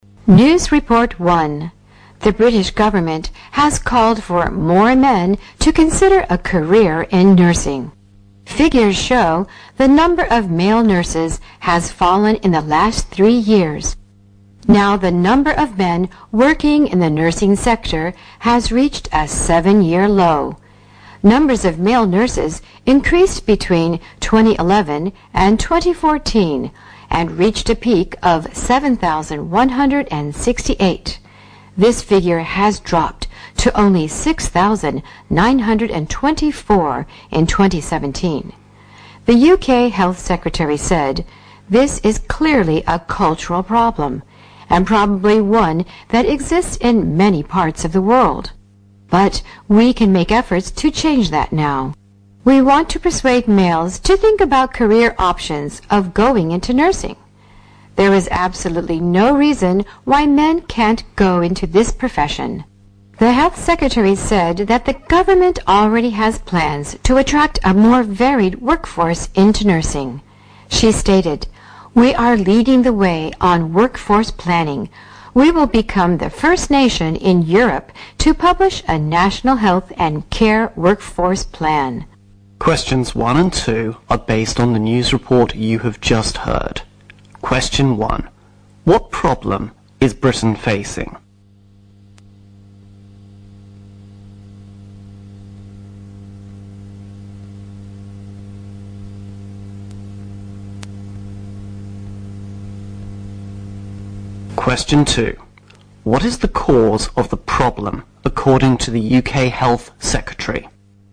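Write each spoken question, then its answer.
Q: What problem is Britain facing?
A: The number of male nurses has fallen (a 7-year low).

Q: What is the cause of the problem, according to the UK Health Secretary?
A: It is a cultural problem.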